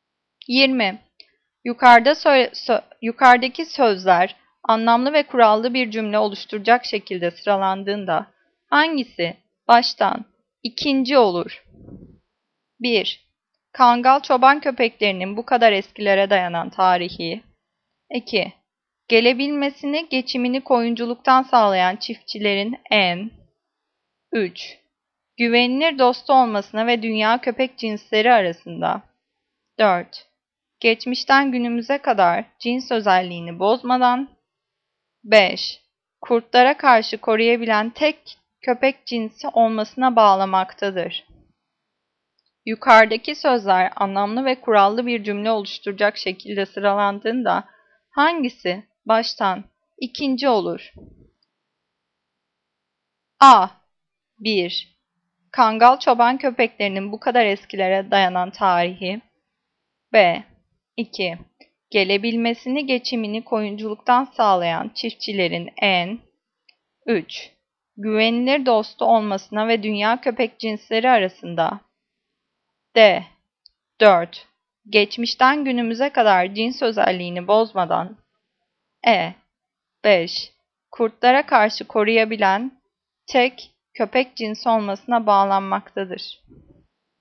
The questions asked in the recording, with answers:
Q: Yukarıdaki sözler anlamlı ve kurallı bir cümle oluşturacak şekilde sıralandığında hangisi baştan ikinci olur?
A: Cevap D. 4. Geçmişten günümüze kadar cins özelliğini bozmadan.